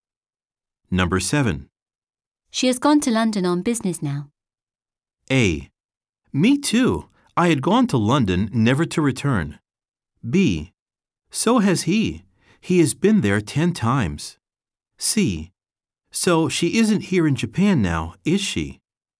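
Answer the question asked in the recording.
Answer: C: So she isn't here in Japan now, is she?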